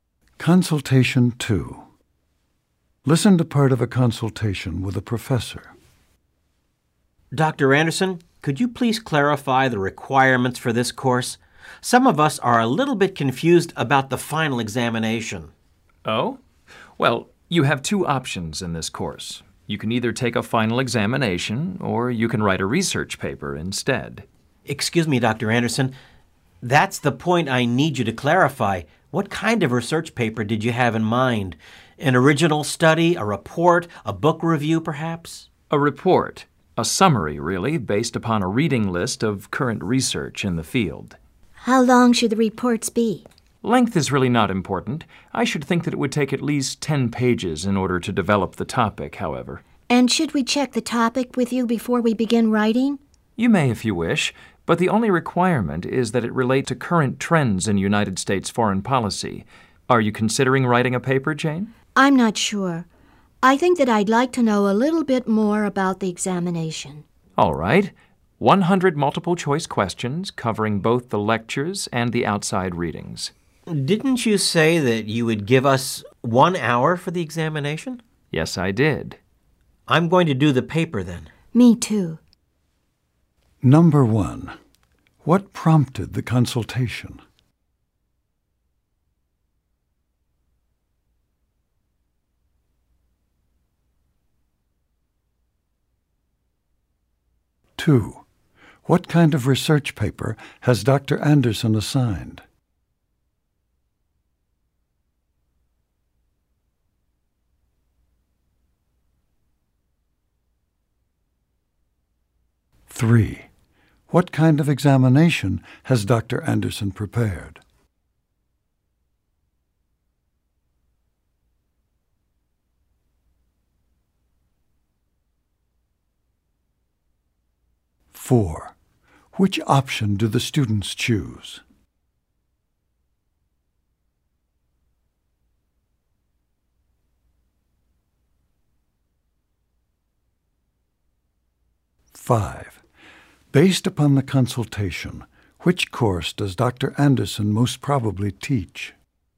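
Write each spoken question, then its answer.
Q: what prompted the consultation?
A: Confusion about the final examination and course requirements

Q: what kind of research paper has Dr.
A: A report summarizing a reading list of current research

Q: what kind of examination has Dr.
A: A one-hour exam with 100 multiple-choice questions on lectures and readings

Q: Which option do the students choose?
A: Writing the research paper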